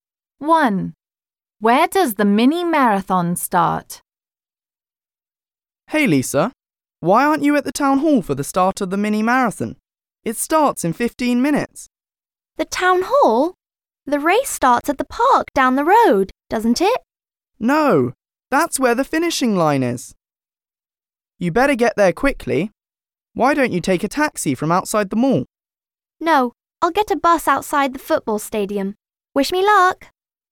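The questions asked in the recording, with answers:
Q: Where does the mini marathon start?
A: At the town hall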